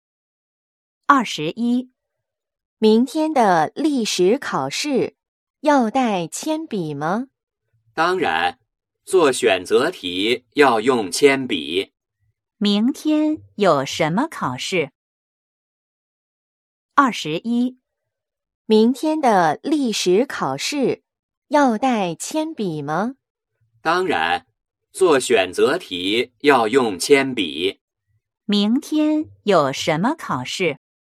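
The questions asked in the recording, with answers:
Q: 明天有什么考试?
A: 历史考试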